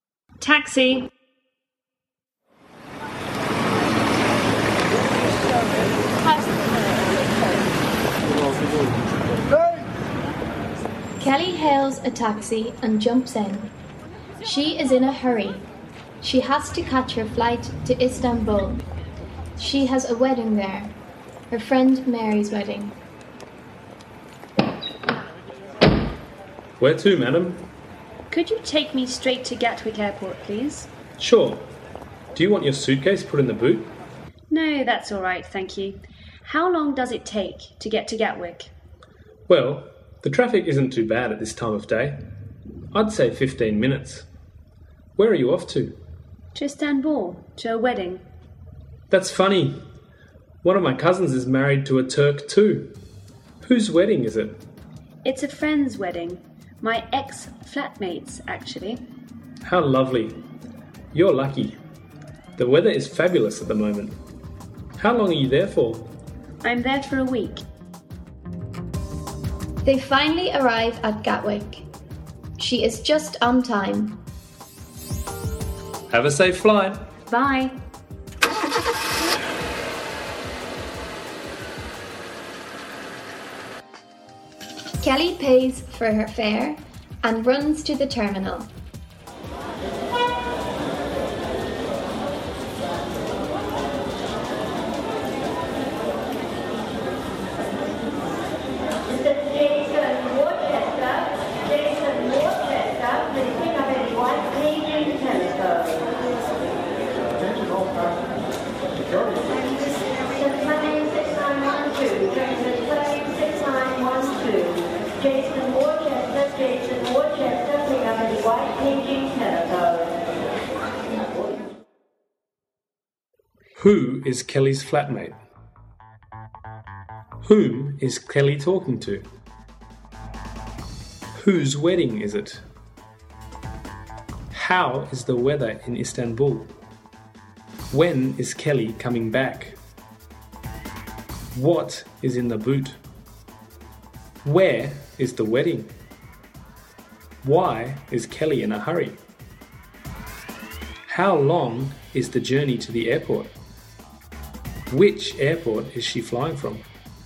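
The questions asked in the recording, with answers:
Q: Whom is Kelly talking to?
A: The taxi driver

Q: Whose wedding is it?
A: Her friend Mary's wedding

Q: How is the weather in Istanbul?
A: Fabulous

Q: When is Kelly coming back?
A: In a week

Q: Where is the wedding?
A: In Istanbul

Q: Why is Kelly in a hurry?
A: She has to catch her flight to Istanbul

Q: How long is the journey to the airport?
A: About 15 minutes

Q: Which airport is she flying from?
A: Gatwick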